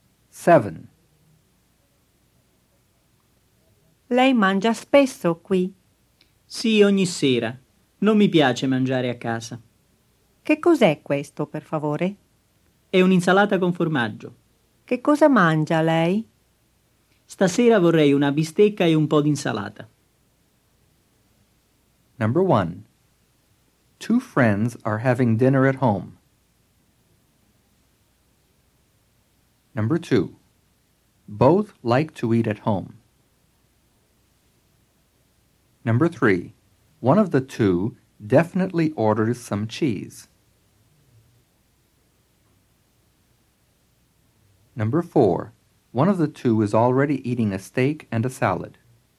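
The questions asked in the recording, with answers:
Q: Two friends are having dinner at home.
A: False

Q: Both like to eat at home.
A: False

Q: One of the two is already eating a steak and a salad.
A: False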